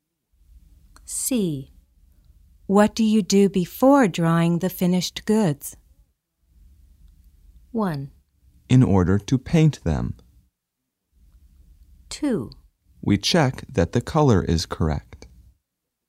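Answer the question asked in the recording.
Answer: 2: We check that the color is correct.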